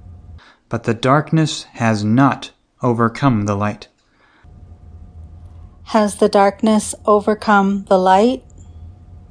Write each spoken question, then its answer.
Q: Has the darkness overcome the light?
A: No, the darkness has not overcome the light.